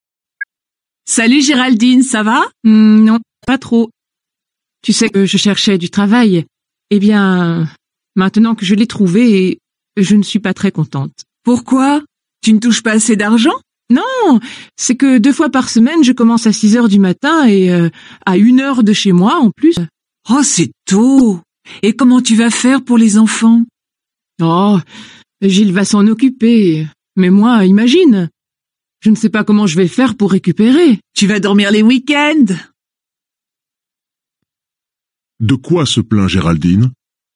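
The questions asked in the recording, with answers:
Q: De quoi se plaint Géraldine?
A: Deux fois par semaine, elle commence à 6 heures du matin, à une heure de chez elle.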